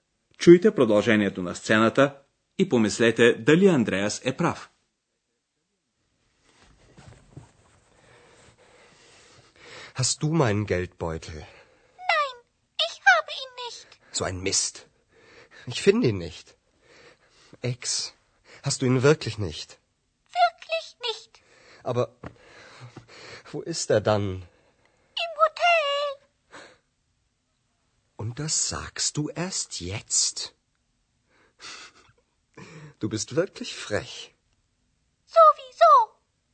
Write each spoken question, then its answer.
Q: Чуйте продължението на сцената и помислете дали Андреас е прав.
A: Портмонето на Андреас не е у екс.